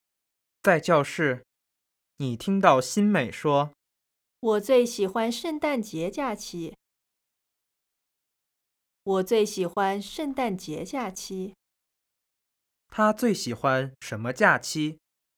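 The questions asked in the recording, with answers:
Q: 他最喜欢什么假期?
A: 圣诞节假期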